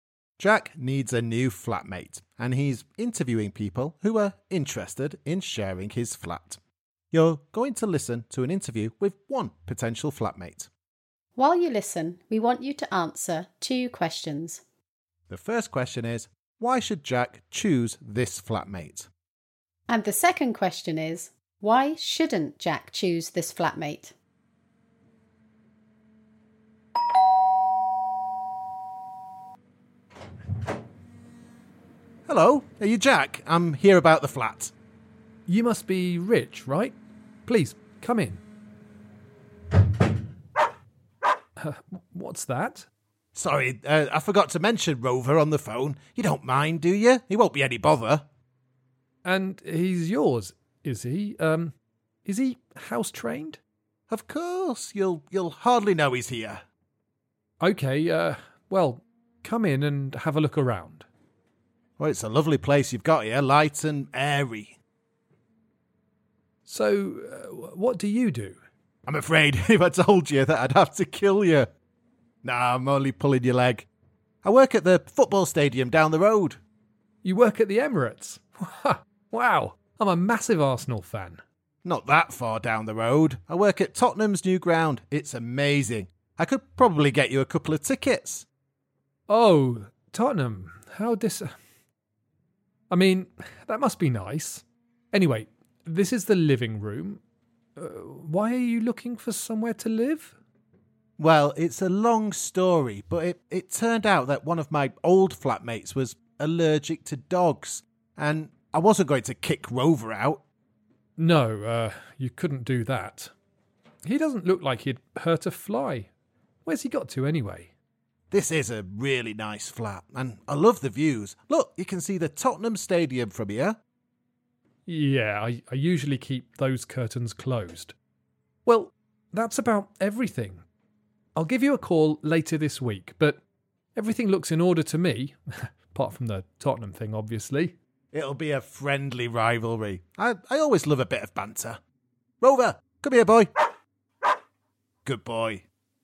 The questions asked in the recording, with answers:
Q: The first question is, why should Jack choose this flatmate?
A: I suppose the biggest plus is that he likes football, so it wouldn't be a problem if the football was on the TV all the time.

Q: And the second question is, why shouldn't Jack choose this flatmate?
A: Well, there's the Tottenham thing, but I was also a bit unsure about the dog.